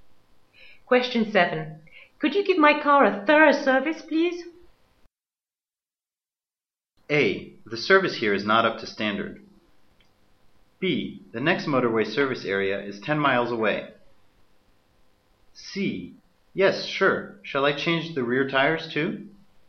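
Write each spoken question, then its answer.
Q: Could you give my car a thorough service, please?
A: C: Yes, sure. Shall I change the rear tires too?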